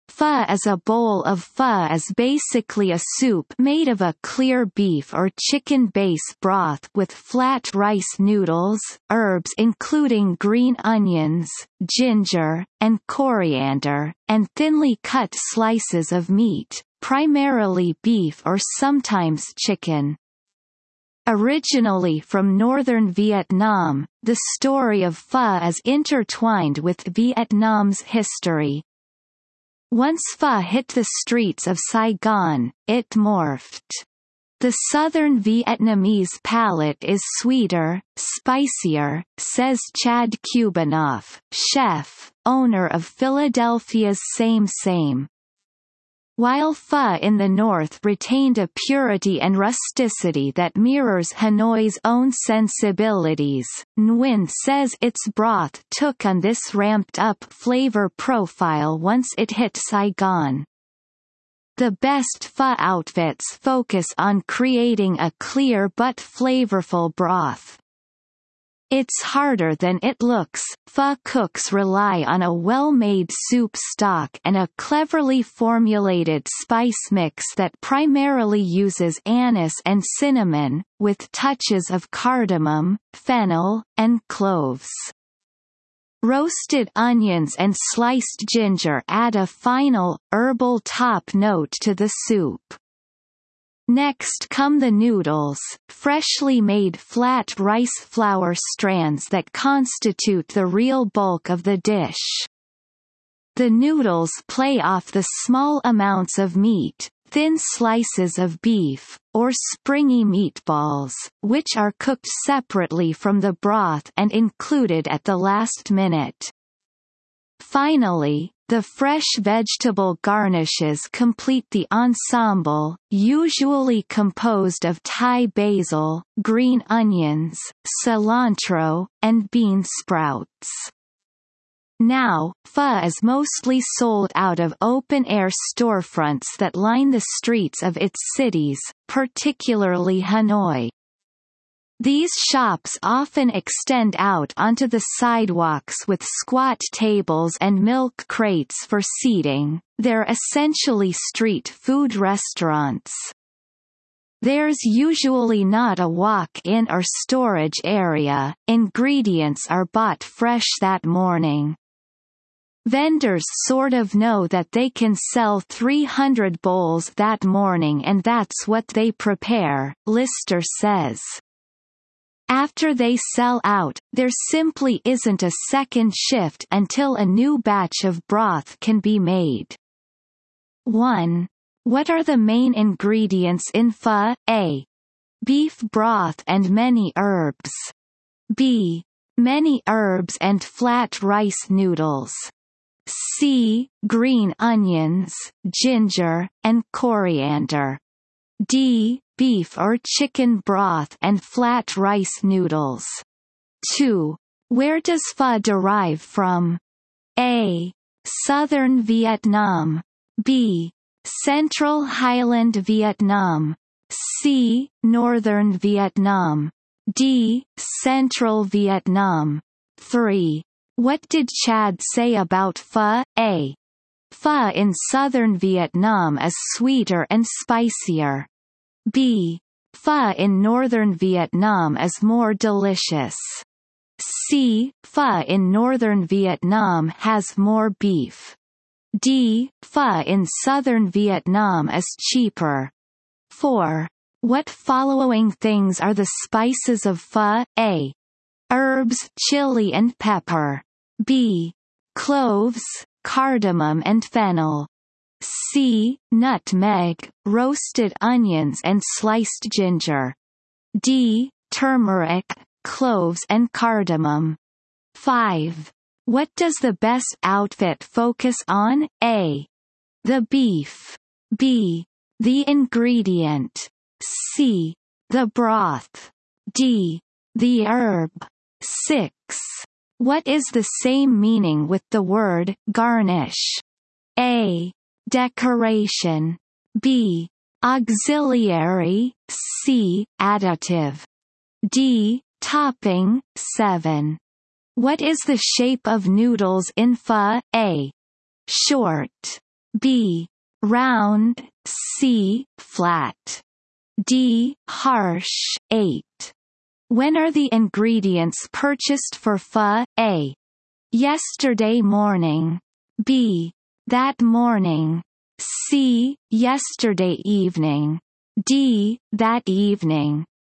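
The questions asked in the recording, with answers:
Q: What are the main ingredients in pho?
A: D: Beef or chicken broth and flat rice noodles.

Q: Where does pho derive from?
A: C: Northern Vietnam.

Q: What did Chad say about pho?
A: A: Pho in southern Vietnam is sweeter and spicier.

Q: What following things are the spices of pho?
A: B: Cloves, cardamom and fennel.

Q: What does the best outfit focus on?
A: C: The broth.

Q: What is the shape of noodles in pho?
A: C: Flat.

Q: When are the ingredients purchased for pho?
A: B: That morning.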